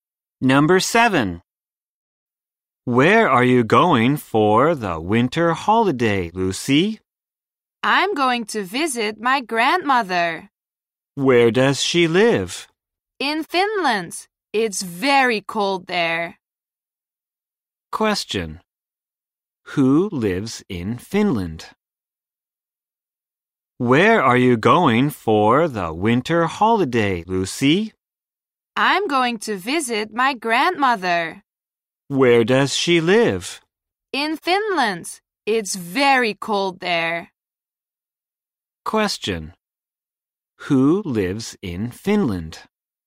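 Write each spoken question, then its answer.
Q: Who lives in Finland?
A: Lucy's grandmother.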